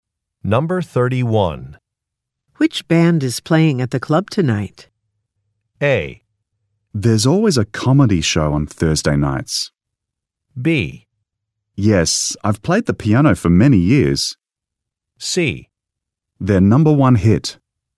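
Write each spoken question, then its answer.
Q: Which band is playing at the club tonight?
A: A: There's always a comedy show on Thursday nights.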